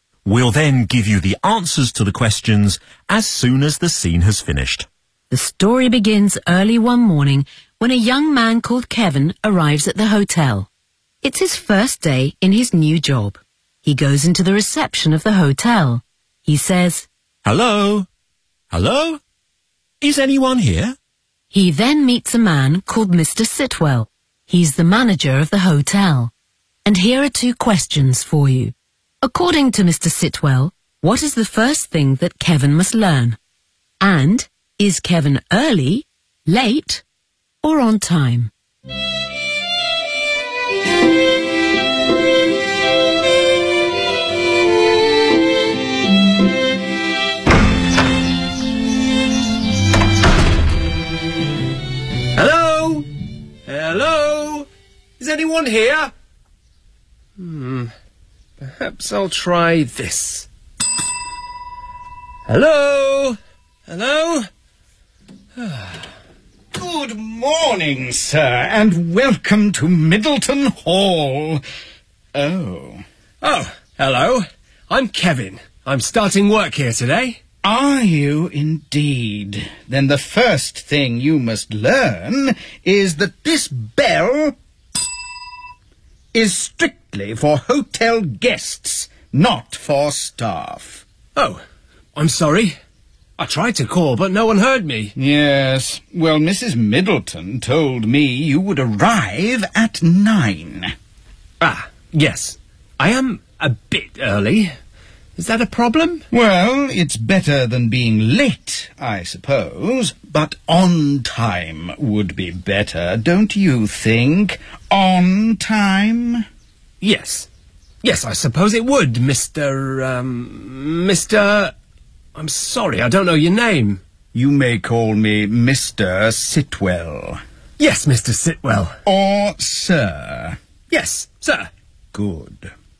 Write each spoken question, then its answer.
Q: According to Mr. Sitwell, what is the first thing that Kevin must learn?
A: The first thing you must learn is that this bell is strictly for hotel guests, not for staff.

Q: And is Kevin early, late, or on time?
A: I'm a bit early. Is that a problem?